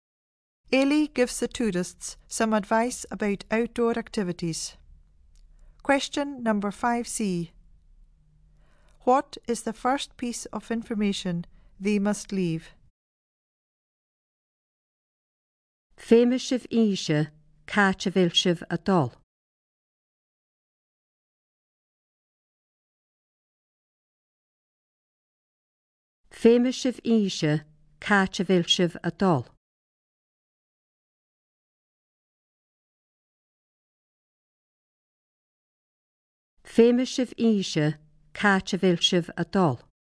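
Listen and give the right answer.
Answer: Where they are going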